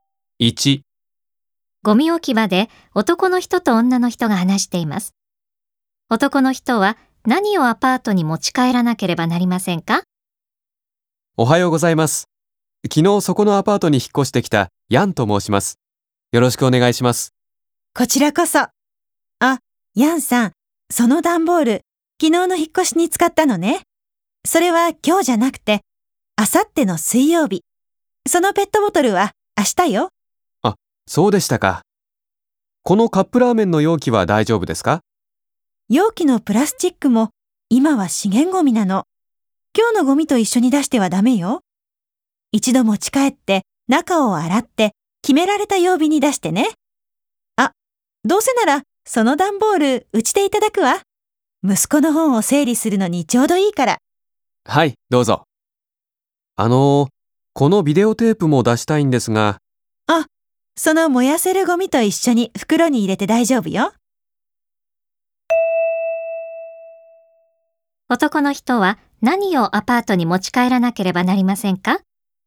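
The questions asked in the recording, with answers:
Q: 男の人は何をアパートに持ち帰らなければなりませんか?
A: ペットボトルとカップラーメンの容器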